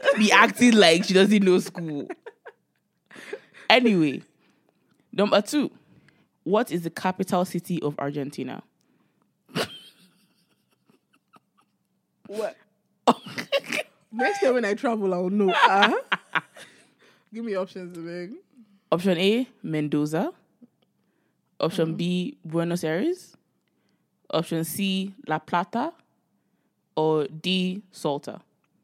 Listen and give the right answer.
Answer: Buenos Aires. Yeah.